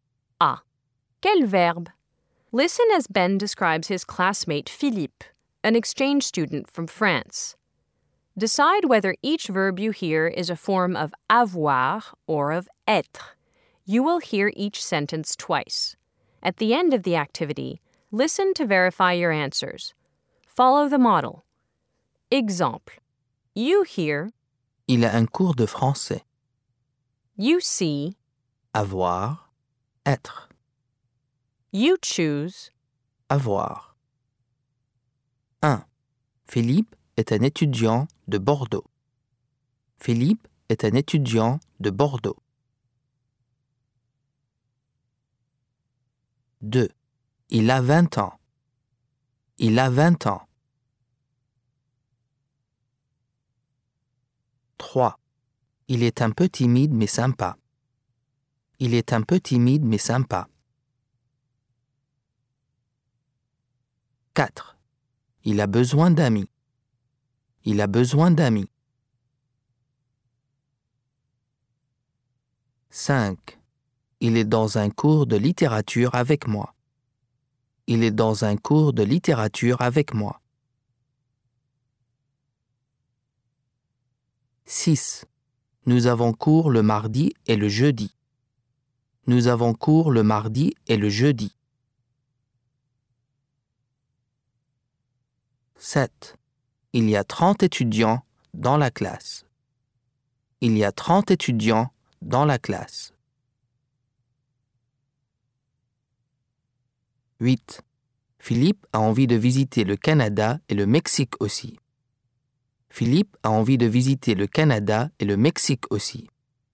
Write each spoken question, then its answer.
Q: Philippe est un étudiant de Bordeaux.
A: Être

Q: Il a 20 ans.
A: Avoir

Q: Il est un peu timide mais sympa.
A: Être

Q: Il a besoin d'amis.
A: Avoir

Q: Il est dans un cours de littérature avec moi.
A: Être

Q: Nous avons cours le mardi et le jeudi.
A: Avoir

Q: Il y a 30 étudiants dans la classe.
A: Avoir

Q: Philippe a envie de visiter le Canada et le Mexique aussi.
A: Avoir